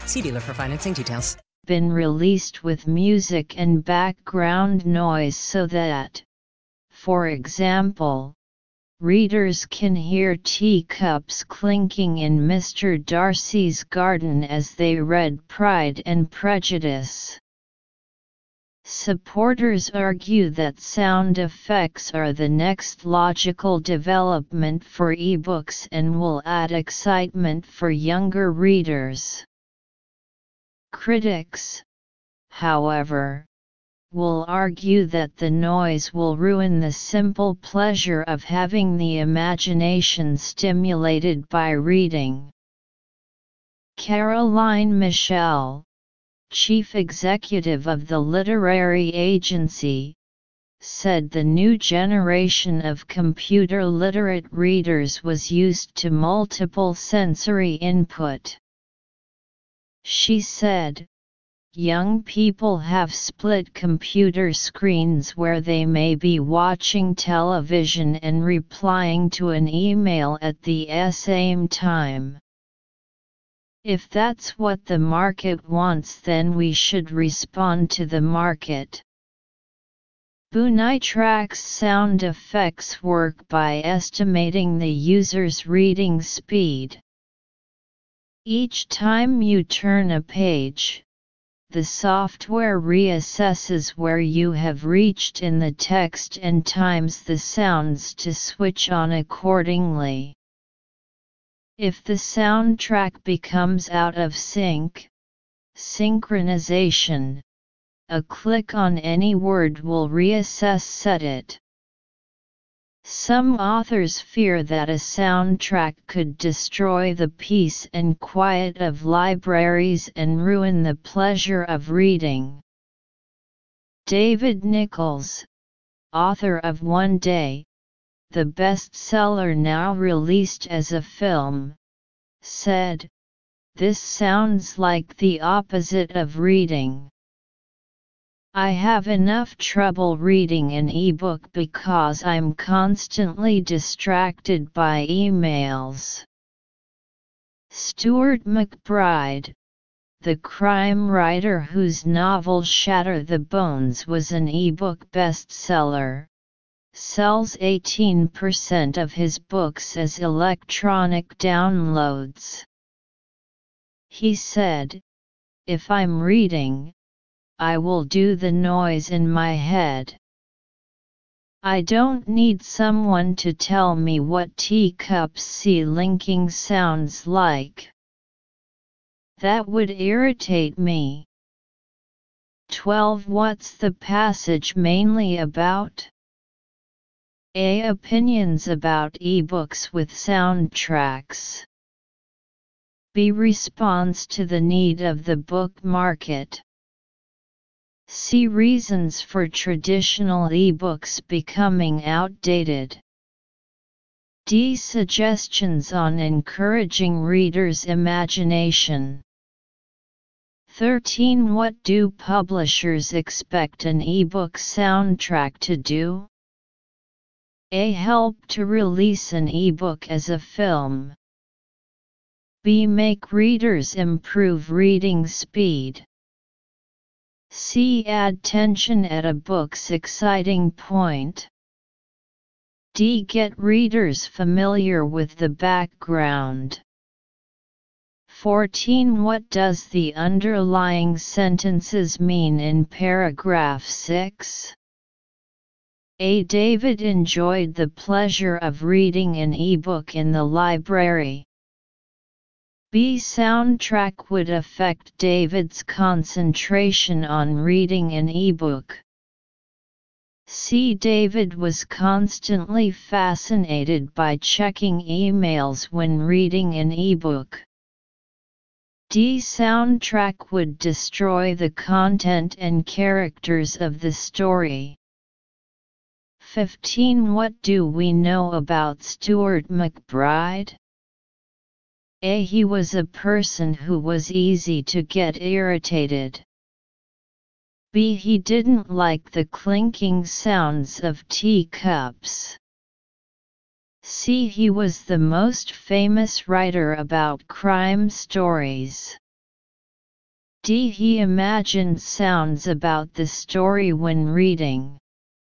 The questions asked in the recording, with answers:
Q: What's the passage mainly about?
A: 12. A.

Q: What does the underlying sentences mean in paragraph 6?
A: 14. B.

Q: What do we know about Stuart McBride?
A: 15. D.